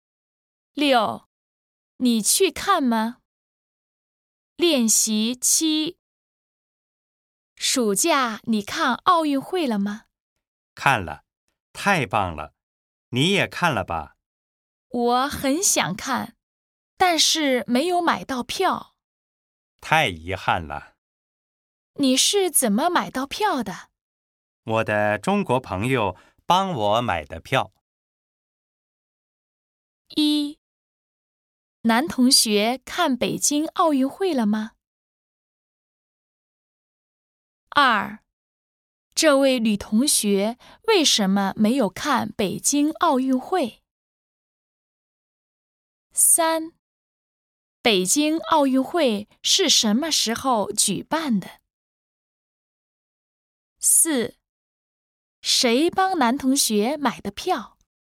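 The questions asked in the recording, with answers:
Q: 男同学看北京奥运会了吗?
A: 看了

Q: 这位女同学为什么没有看北京奥运会?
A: 没有买到票

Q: 北京奥运会是什么时候举办的?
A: 暑假

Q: 谁帮男同学买的票?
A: 他的中国朋友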